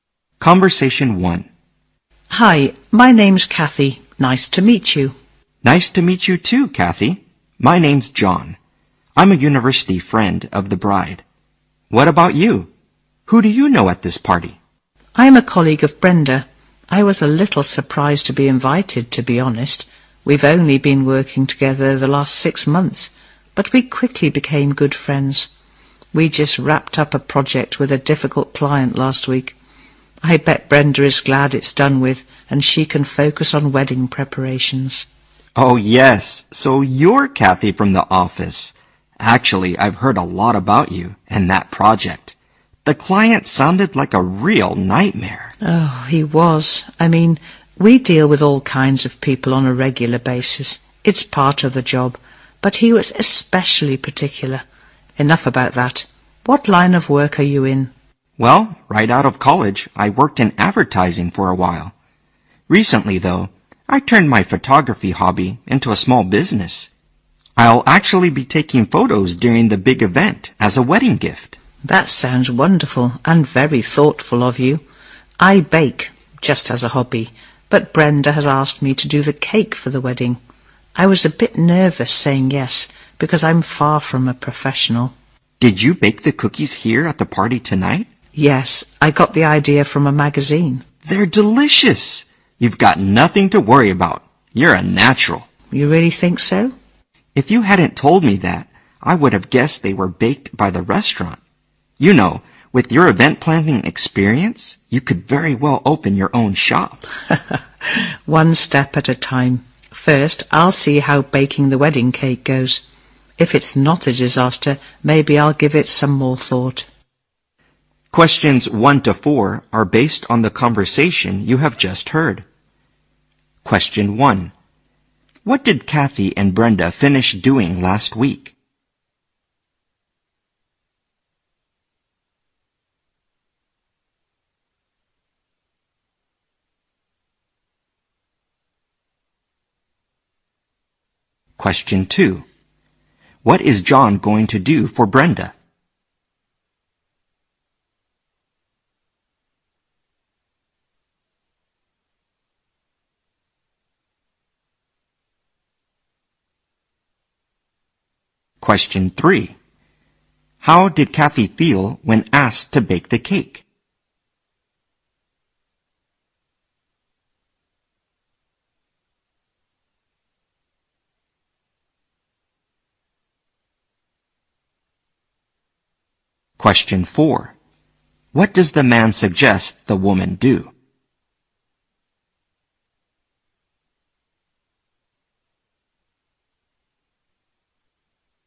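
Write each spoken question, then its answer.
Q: What did Kathy and Brenda finish doing last week?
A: A project with a difficult client

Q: What is John going to do for Brenda?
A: Take photos at her wedding as a gift

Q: How did Kathy feel when asked to bake the cake?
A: Nervous

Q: What does the man suggest the woman do?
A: Open her own shop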